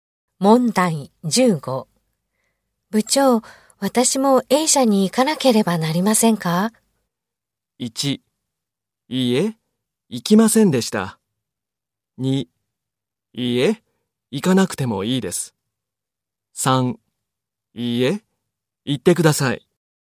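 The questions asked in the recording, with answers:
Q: 部長、私も A 社に行かなければなりませんか?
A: 1: いいえ、行かなくてもいいです。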